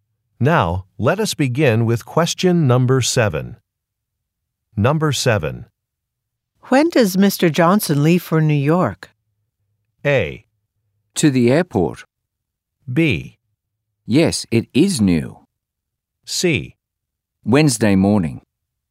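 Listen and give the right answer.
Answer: C: Wednesday morning.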